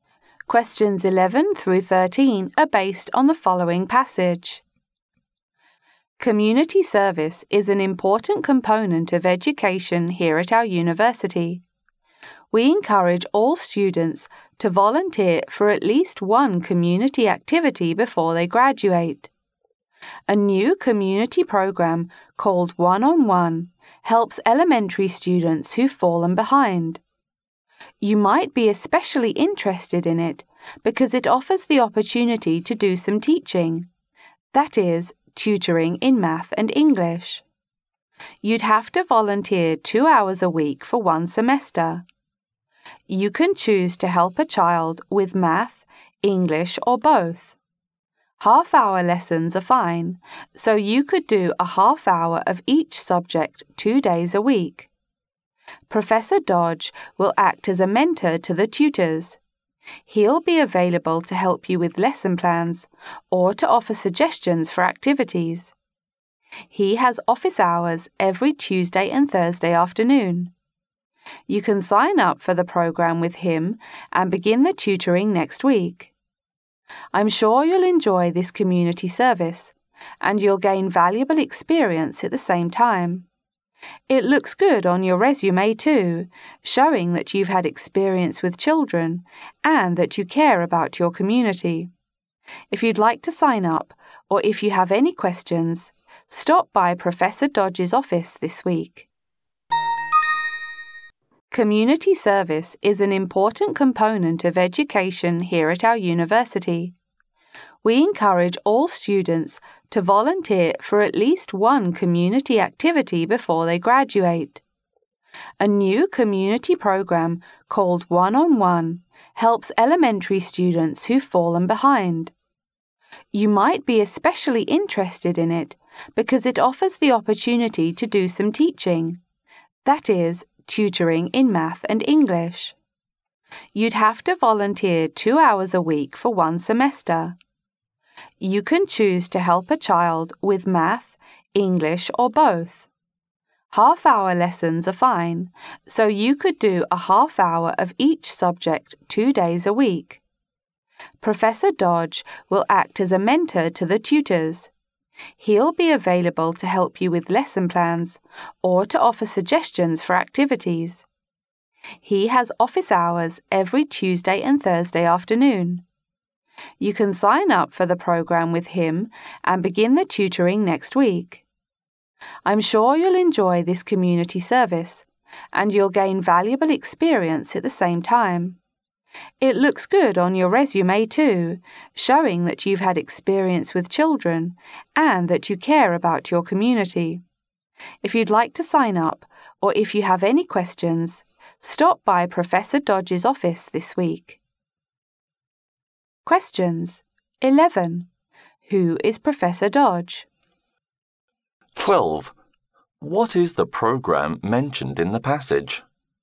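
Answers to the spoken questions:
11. The mentor to the tutors
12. One-on-One, a program where volunteers tutor elementary students in math and English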